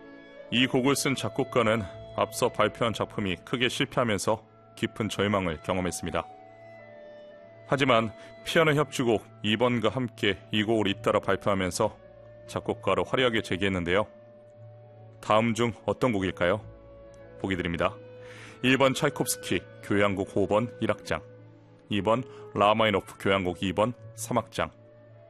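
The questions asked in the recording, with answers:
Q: 다음 중 어떤 곡일까요?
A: 2: 라흐마니노프 교향곡 2번 3악장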